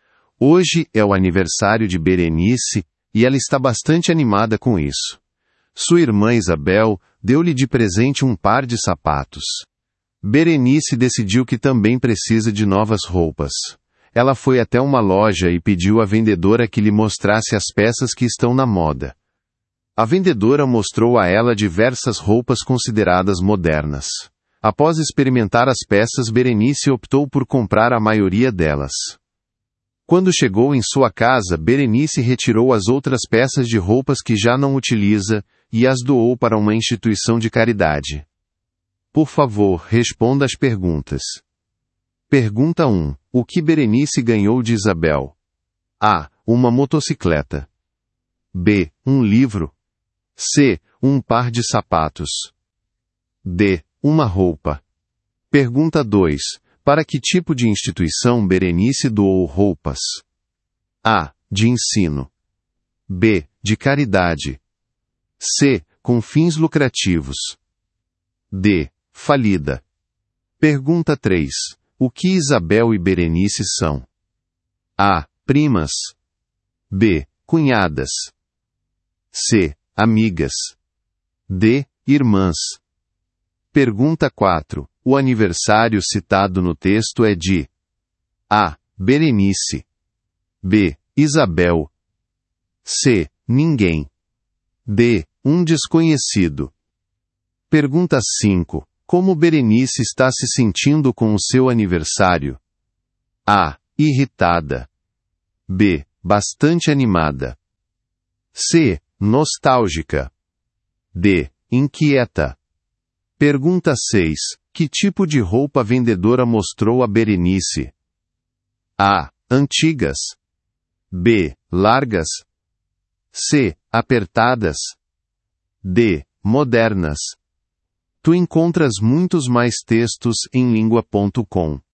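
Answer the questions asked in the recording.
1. C: Um par de sapatos.
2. B: De caridade.
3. D: Irmãs.
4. A: Berenice.
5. B: Bastante animada.
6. D: Modernas.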